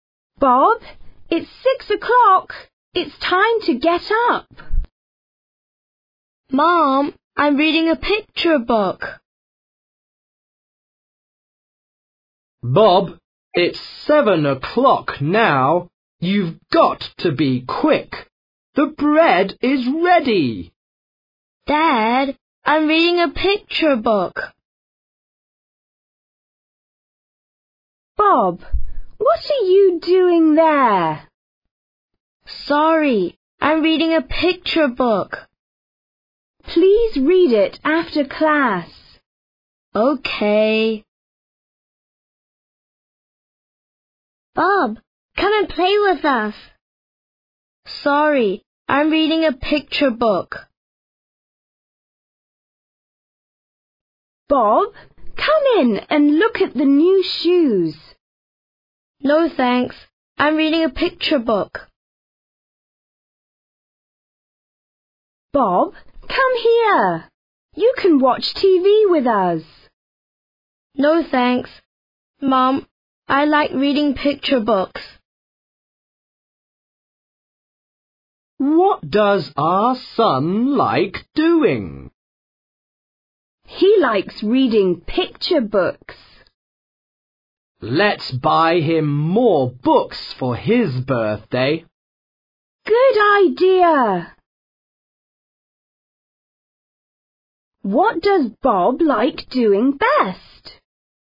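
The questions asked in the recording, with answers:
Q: What does Bob like doing best?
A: He likes reading picture books.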